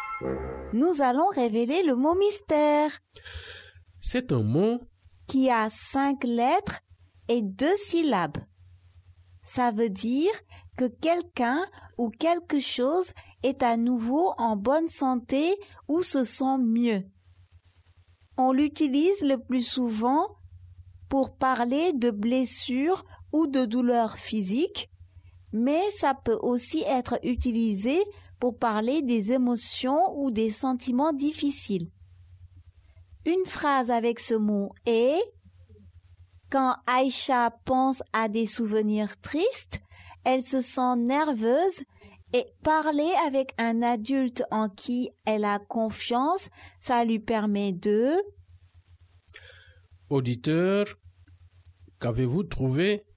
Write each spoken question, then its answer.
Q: Auditeur, qu'avez-vous trouvé?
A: Le mot mystère est « guérir ».